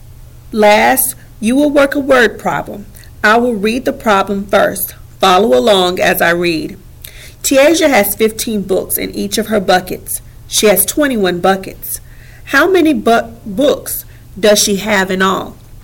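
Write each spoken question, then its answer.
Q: How many books does she have in all?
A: 315 books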